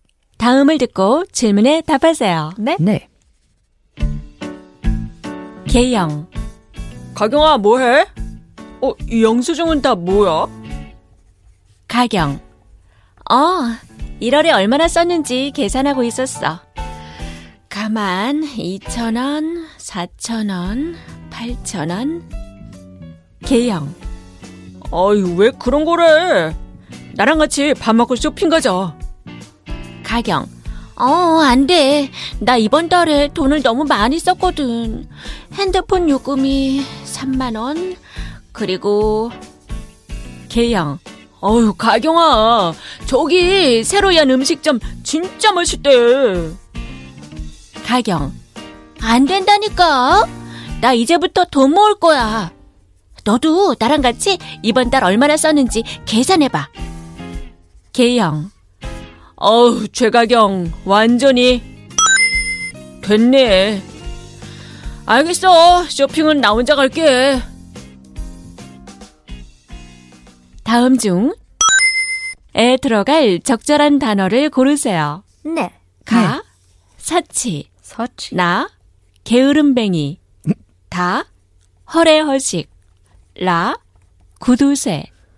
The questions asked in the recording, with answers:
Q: 다음 중에 들어갈 적절한 단어를 고르세요.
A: La, Kudusue. 완전히 Kudusue가 됐네.